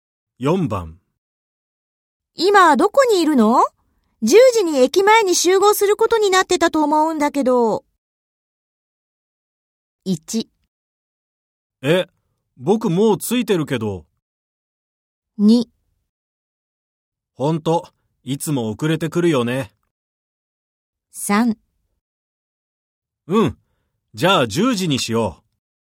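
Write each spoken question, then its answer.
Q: 今どこにいるの?10時に駅前に集合することになってたと思うんだけど。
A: 1: え、僕もう着いてるけど。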